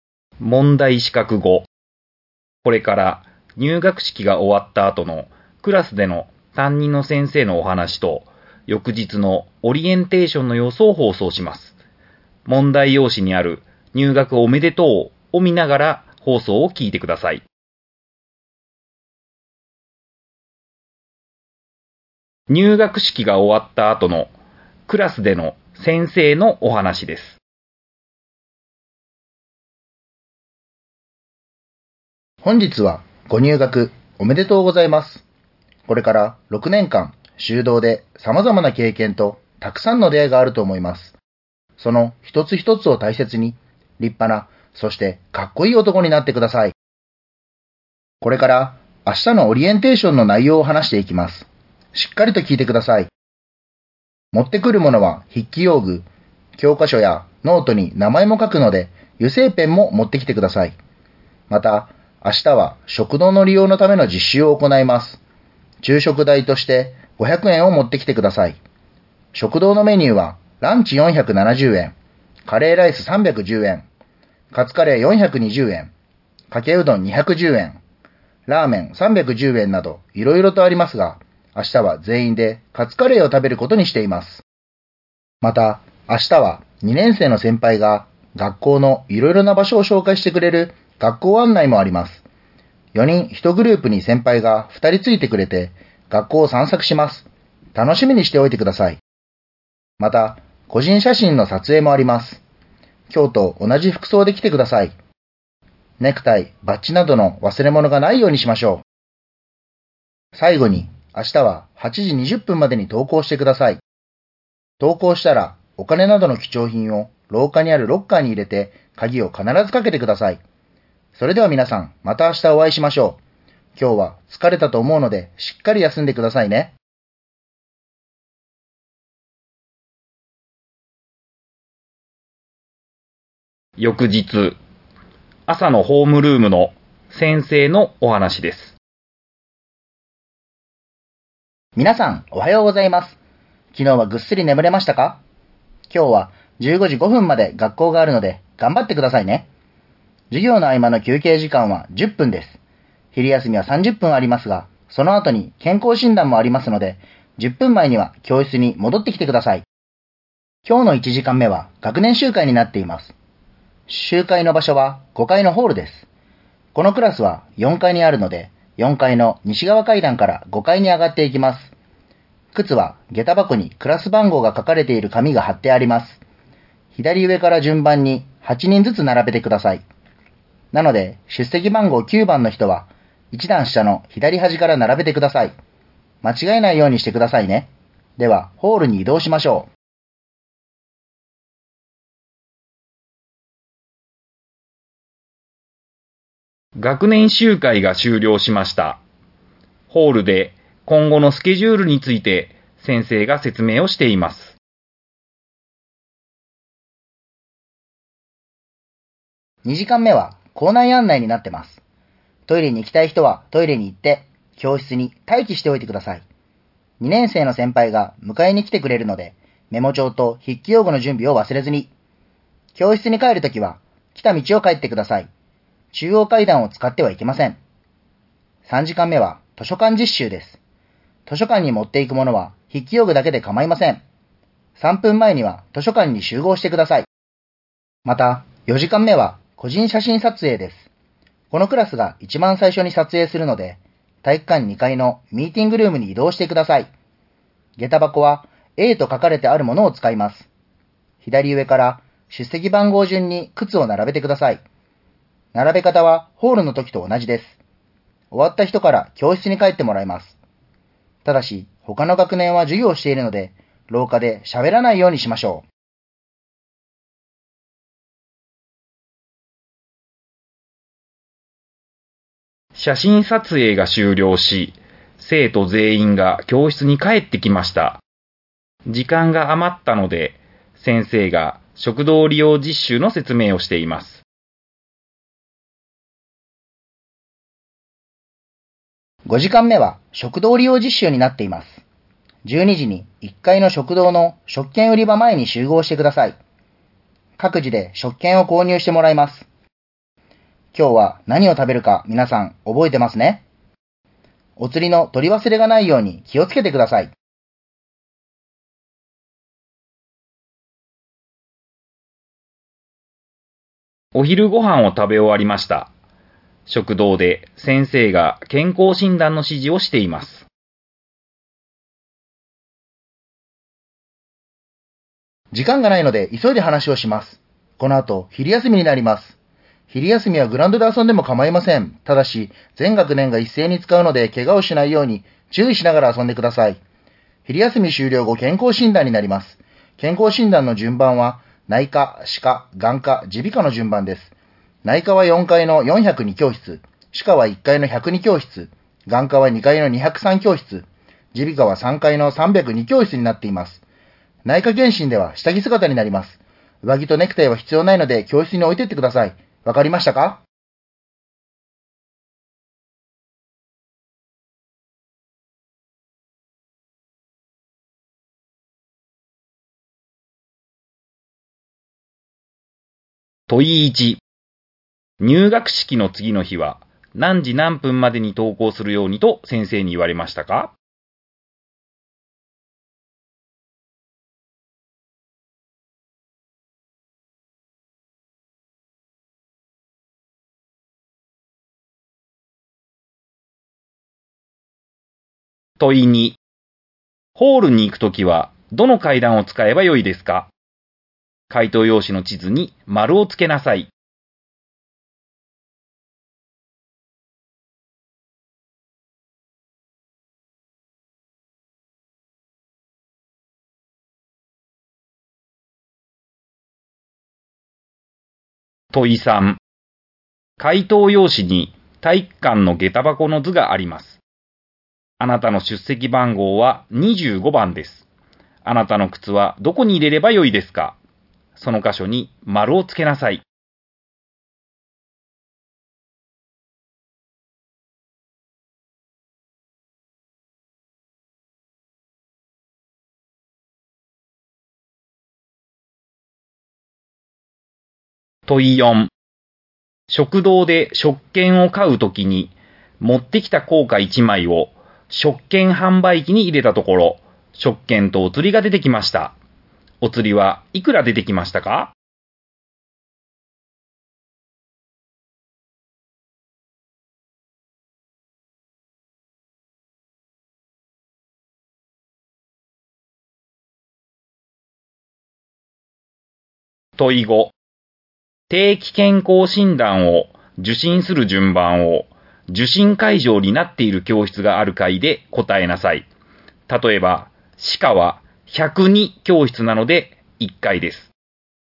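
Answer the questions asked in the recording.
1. 8時20分
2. 80円
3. 4階、1階、2階、3階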